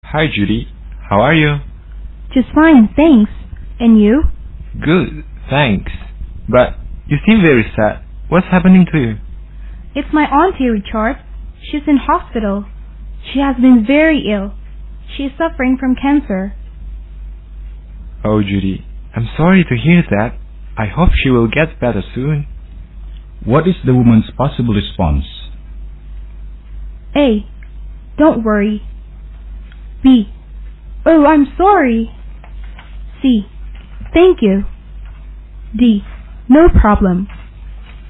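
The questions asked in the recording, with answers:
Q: What is the woman's possible response?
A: C: Thank you.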